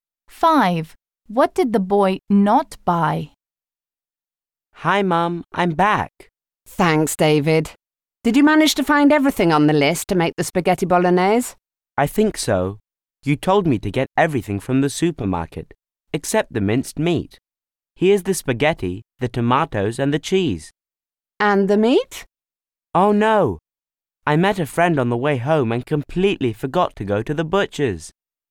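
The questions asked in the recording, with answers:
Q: What did the boy not buy?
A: The minced meat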